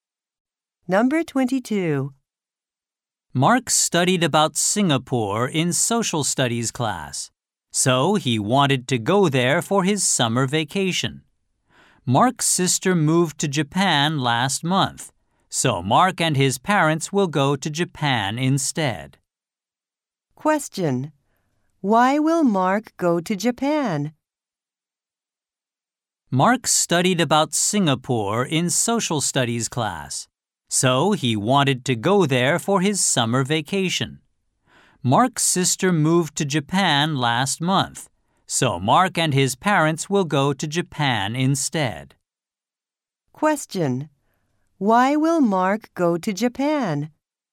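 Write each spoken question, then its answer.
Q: Why will Mark go to Japan?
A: His sister moved to Japan last month.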